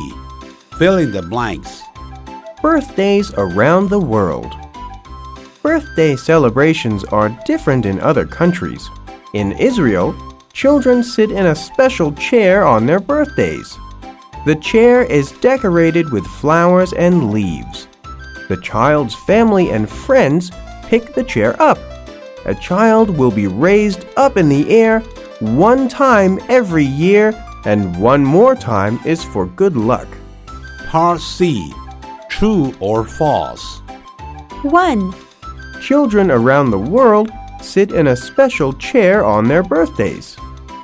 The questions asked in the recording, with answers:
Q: Children around the world sit in a special chair on their birthdays.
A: False. Children in Israel sit in a special chair on their birthdays.